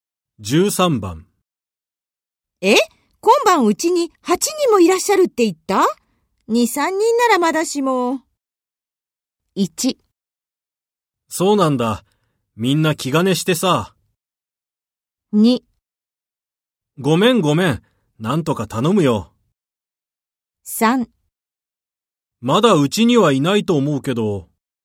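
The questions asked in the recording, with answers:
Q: え?今晩うちに8人もいらっしゃるって言った? 2、3 人ならまだしも。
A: 2: ごめんごめん。なんとか頼むよ。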